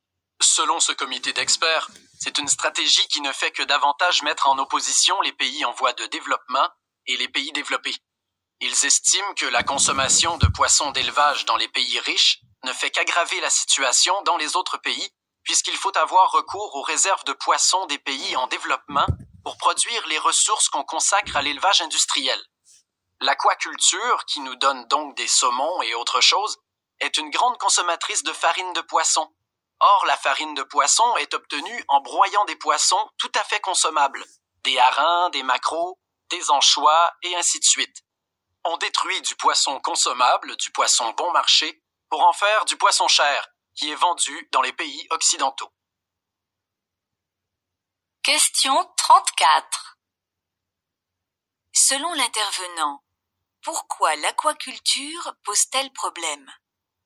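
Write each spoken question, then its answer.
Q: Selon l'intervenant, pourquoi l'aquaculture pose-t-elle problème ?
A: Elle détruit du poisson consommable et bon marché des pays en développement, broyé en farine, pour produire du poisson cher vendu dans les pays riches.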